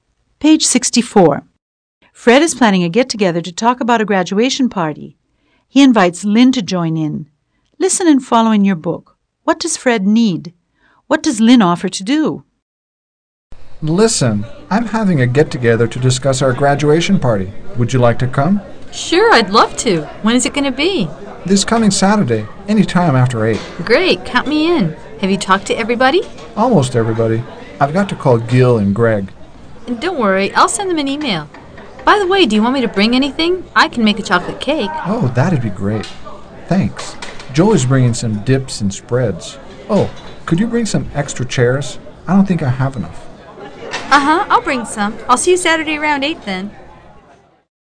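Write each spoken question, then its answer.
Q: What does Fred need?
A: Some extra chairs

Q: What does Lynn offer to do?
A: Make a chocolate cake (and email Gil and Greg)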